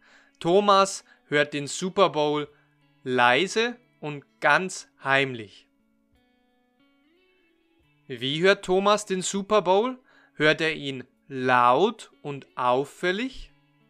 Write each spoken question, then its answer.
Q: Wie hört Thomas den Super Bowl?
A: Er hört ihn heimlich und leise.